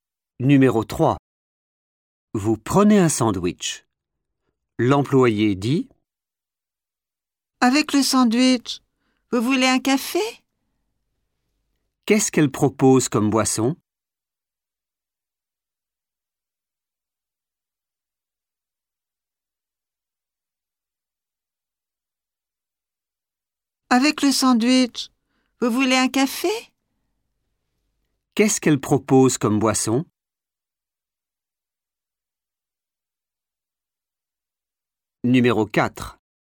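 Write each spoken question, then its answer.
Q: Qu'est-ce qu'elle propose comme boisson?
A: un café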